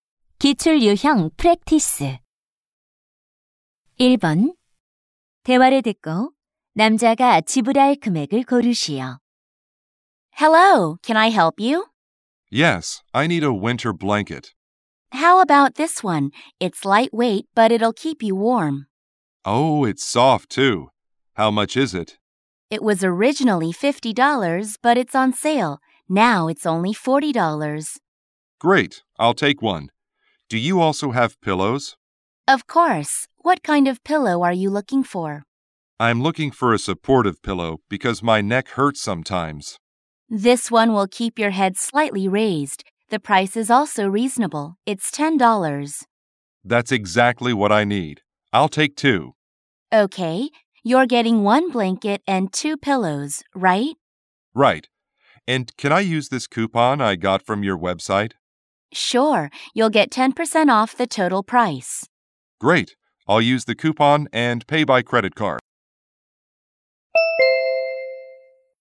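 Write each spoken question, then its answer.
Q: 대화를 듣고 남자가 지불할 금액을 고르시오.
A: $54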